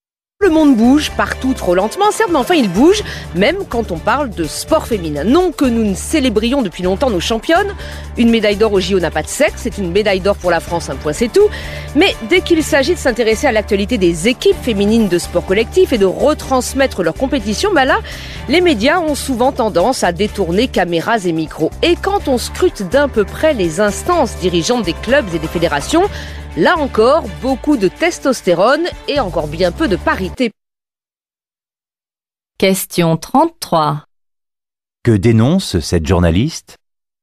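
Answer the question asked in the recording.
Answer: Le manque de couverture médiatique du sport collectif féminin et le manque de parité dans les instances dirigeantes du sport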